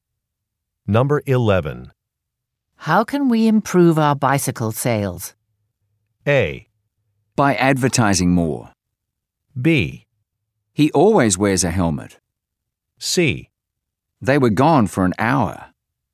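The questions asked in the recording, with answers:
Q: How can we improve our bicycle sales?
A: A: By advertising more.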